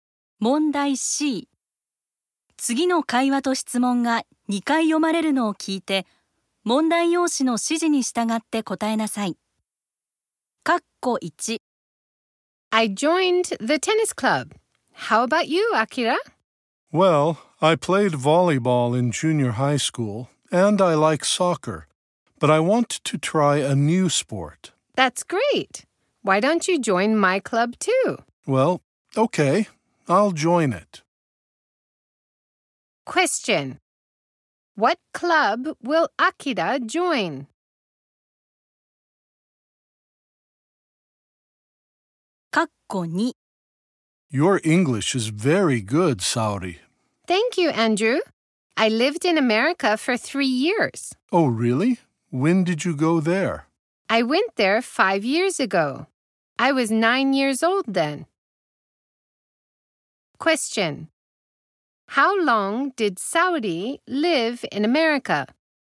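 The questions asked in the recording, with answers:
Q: What club will Akira join?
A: The tennis club.

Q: How long did Saori live in America?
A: For 3 years.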